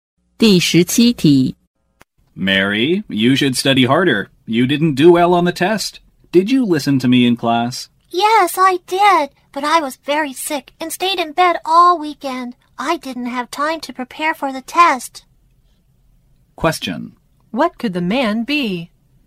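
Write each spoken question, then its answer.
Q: What could the man be?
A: A teacher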